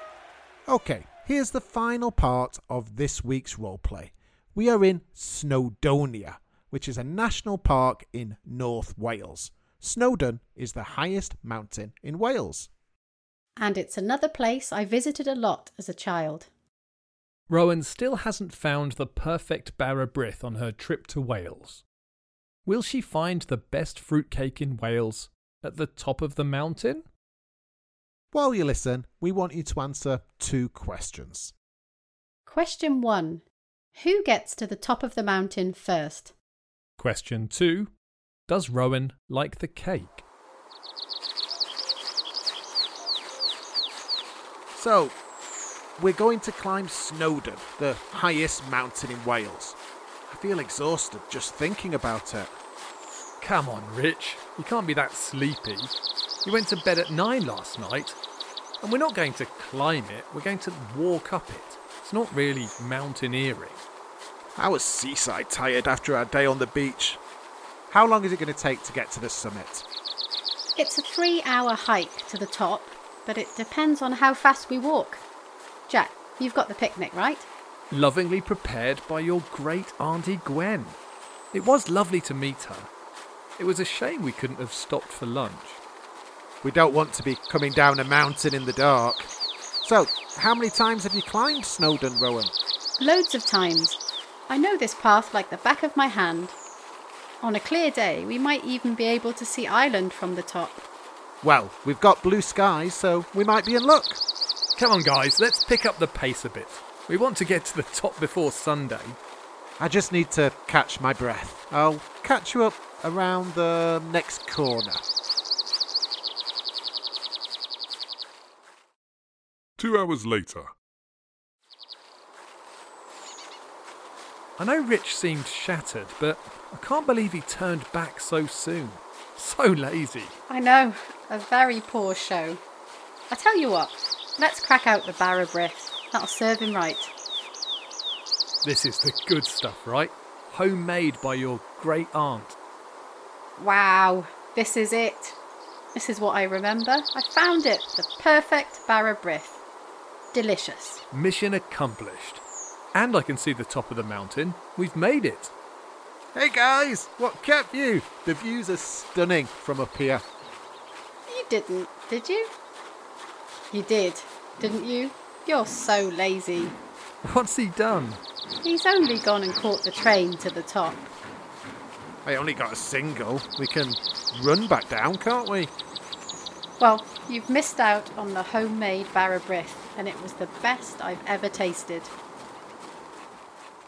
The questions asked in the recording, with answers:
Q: Who gets to the top of the mountain first?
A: The answer was me, as I'm a world-class mountain climber.

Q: Does Rowan like the cake?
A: And the answer is finally yes.